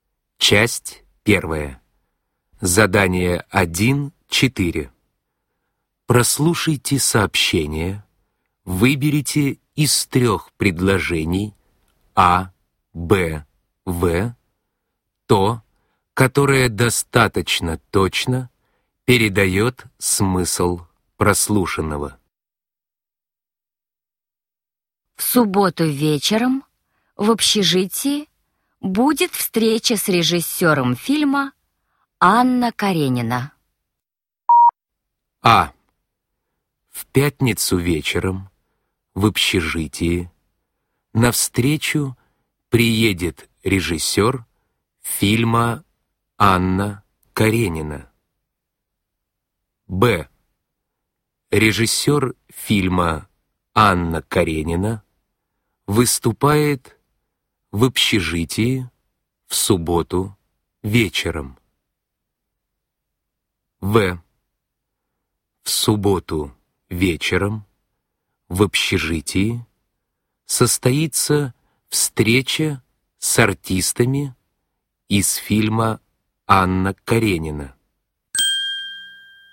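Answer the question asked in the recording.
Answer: Б: Режиссер фильма Анна Каренина выступает в общежитии в субботу вечером.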